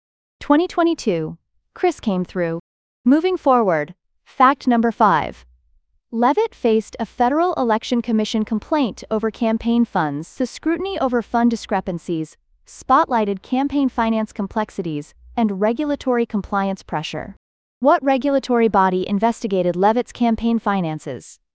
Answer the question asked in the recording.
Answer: Correct answer, Federal Election Commission.